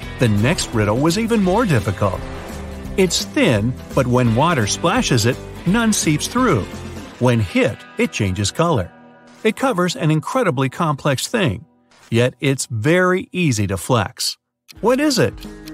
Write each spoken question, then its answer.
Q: What is it?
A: It's the skin.